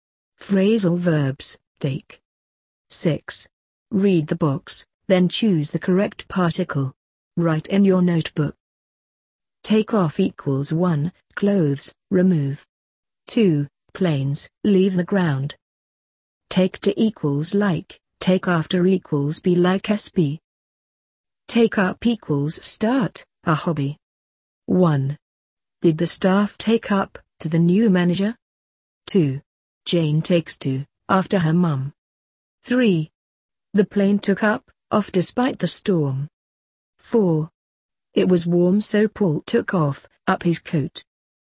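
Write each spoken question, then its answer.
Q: Did the staff take up, to the new manager?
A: to

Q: Jane takes to, after her mum.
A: after

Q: The plane took up, off despite the storm.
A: off

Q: It was warm so Paul took off, up his coat.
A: off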